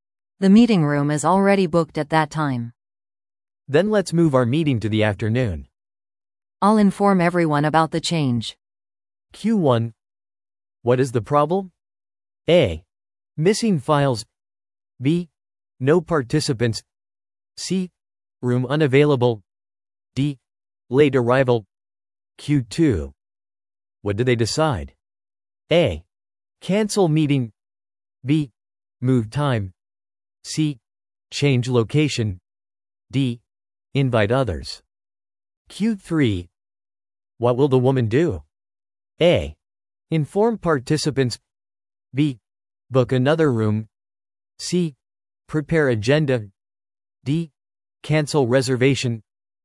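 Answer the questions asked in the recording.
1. C: Room unavailable.
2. B: Move time.
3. A: Inform participants.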